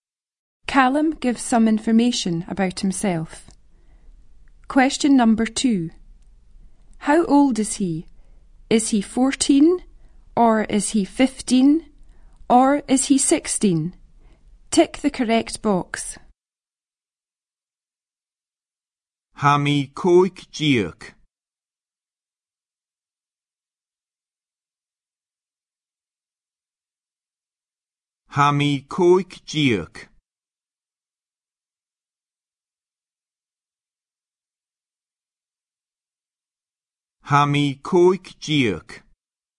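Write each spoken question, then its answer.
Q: How old is he?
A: 15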